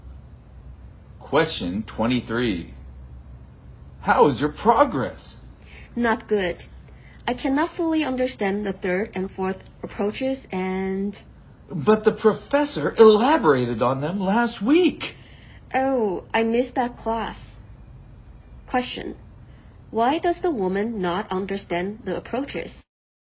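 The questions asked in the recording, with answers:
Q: Why does the woman not understand the approaches?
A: She missed the class where the professor explained them.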